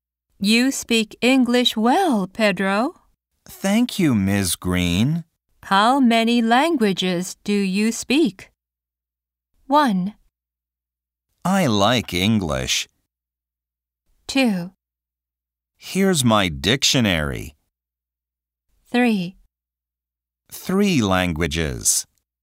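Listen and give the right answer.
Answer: 3: 3 languages.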